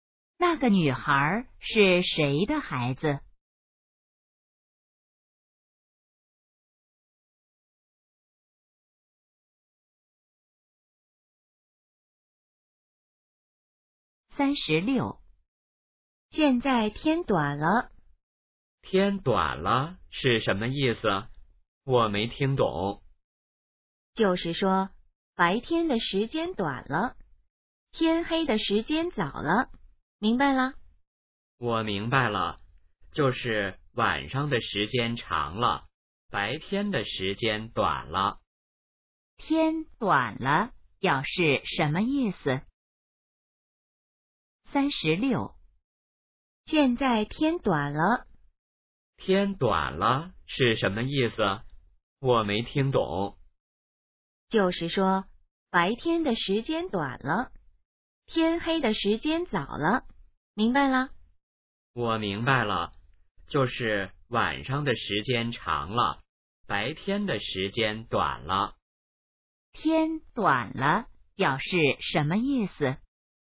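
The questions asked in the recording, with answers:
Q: 天短了表示什么意思?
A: 白天的时间短了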